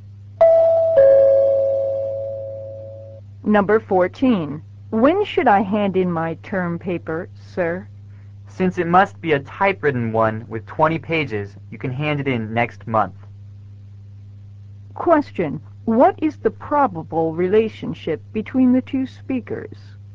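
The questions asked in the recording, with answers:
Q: What is the probable relationship between the two speakers?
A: Student and teacher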